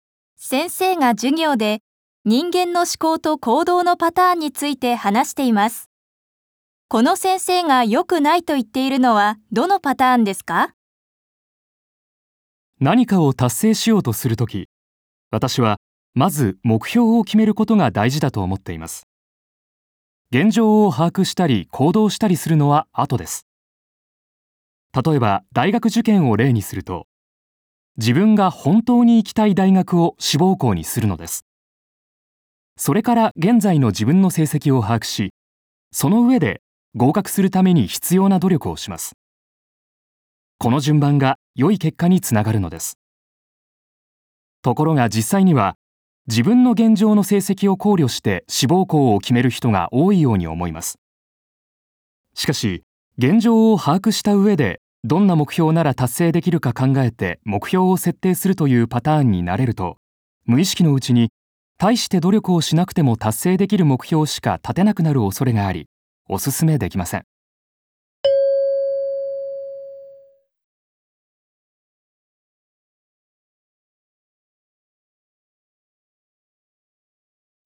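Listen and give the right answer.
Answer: まず現状を把握してから、達成できそうな目標を設定するパターン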